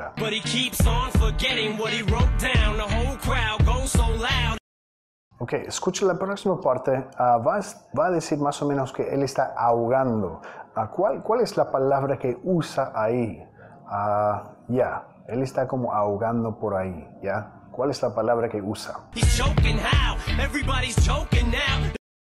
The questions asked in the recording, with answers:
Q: ¿Cuál es la palabra que usa?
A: He's choking how? Él está ahogando.